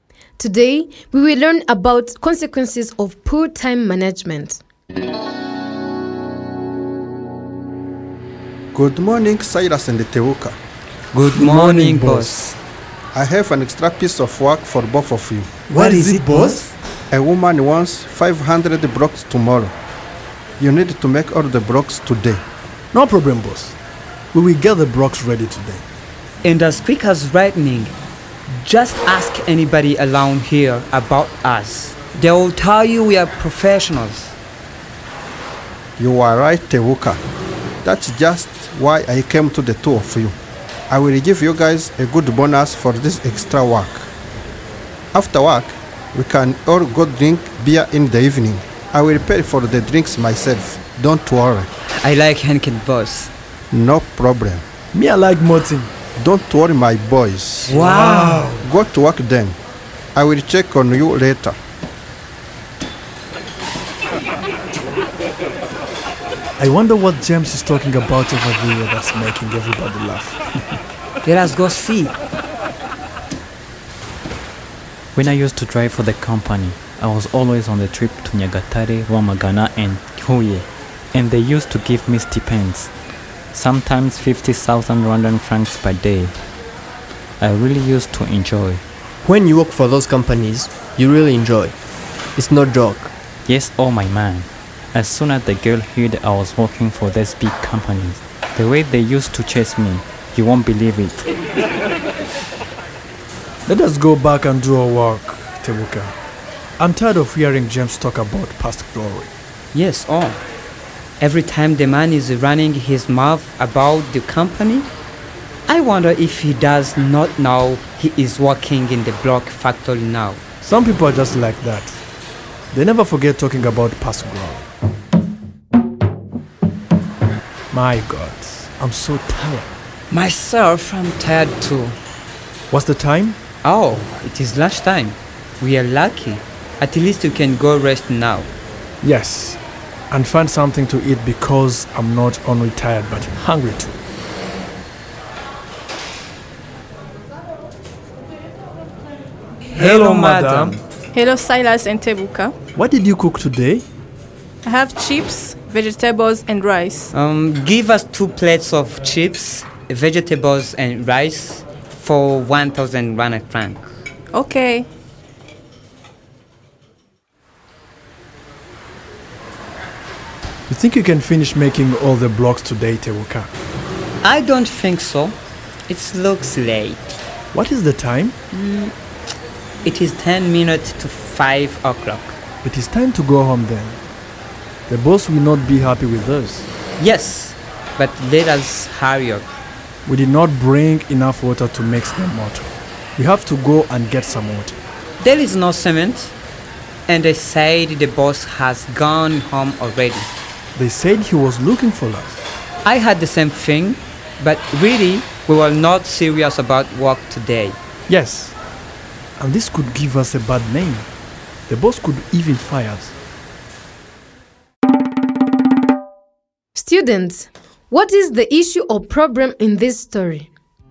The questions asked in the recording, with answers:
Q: Students, what is the issue or problem in this story?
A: You might have said the problem is that Silas and Teuka did not plan their time well and they wasted a lot of time when they could have been making the blocks.